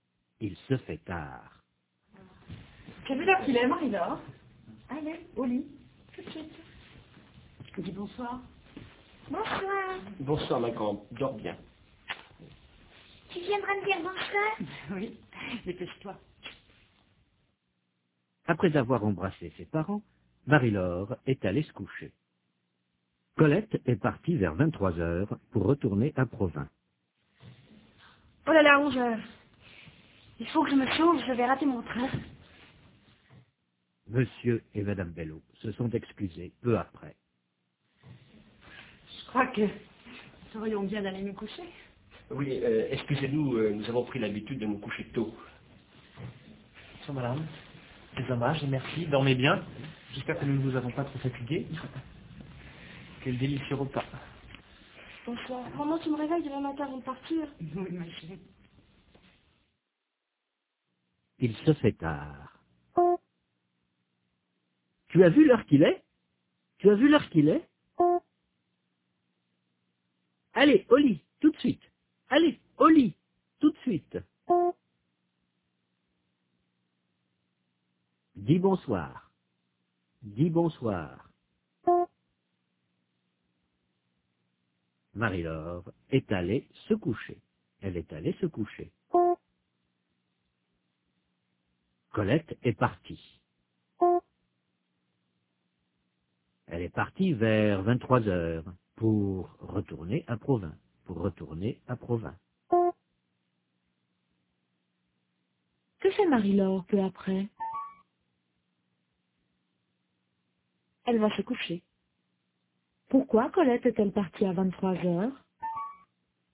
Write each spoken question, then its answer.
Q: Pourquoi Colette est-elle partie à 23h?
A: Pour retourner à Provins.